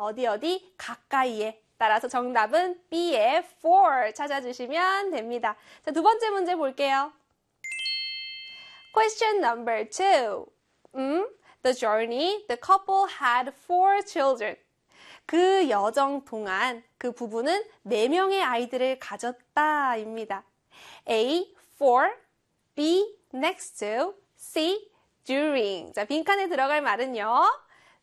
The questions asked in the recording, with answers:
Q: 자, 빈칸에 들어갈 말은요.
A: 그렇습니다. C의 during이었어요.